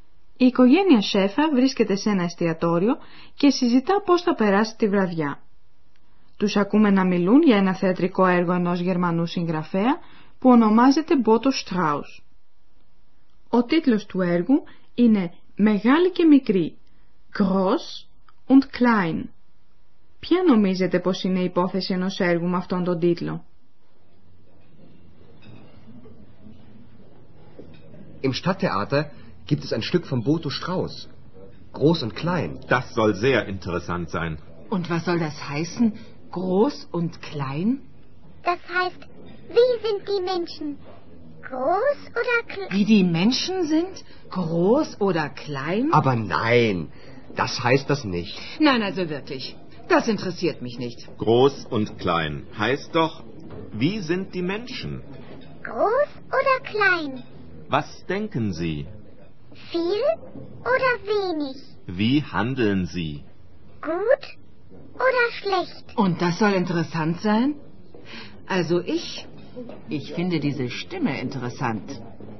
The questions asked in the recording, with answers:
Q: Ποια νομίζετε πως είναι η υπόθεση ενός έργου με αυτόν τον τίτλο?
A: Το «Μεγάλη και μικρή» αφορά το χαρακτήρα των ανθρώπων.